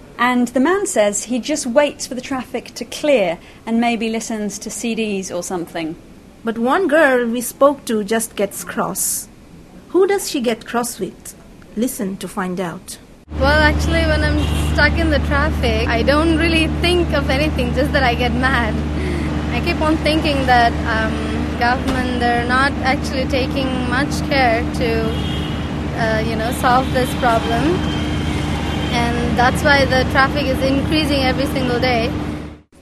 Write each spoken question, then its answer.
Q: Who does she get cross with?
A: Well, she gets cross with the government because she thinks the government isn't doing enough to sort out the traffic.